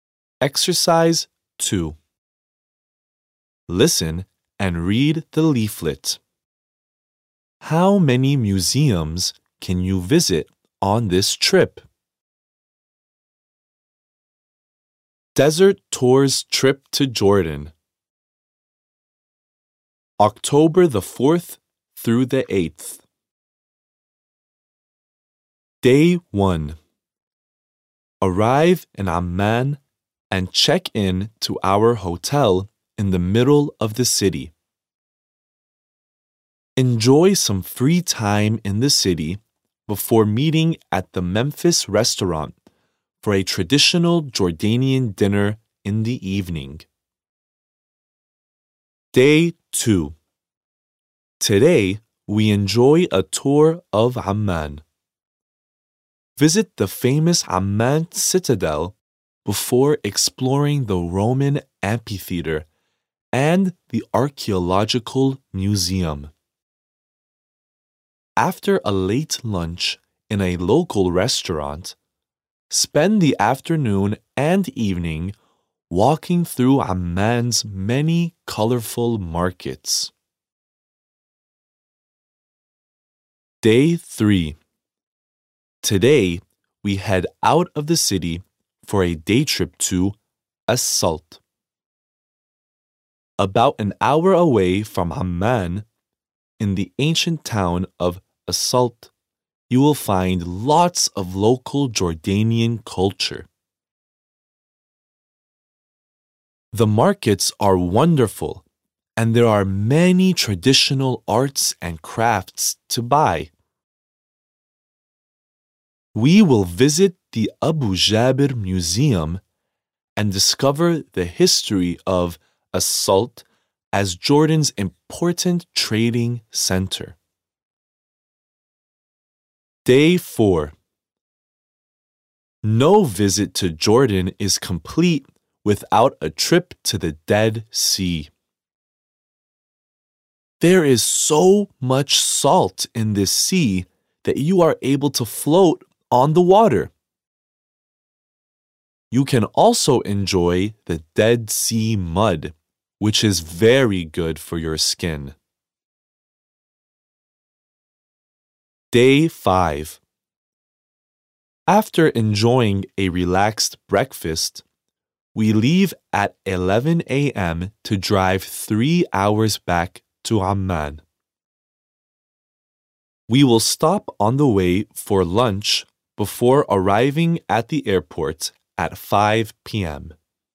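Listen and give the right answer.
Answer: Two (the archaeological museum and the Abu Jaber Museum)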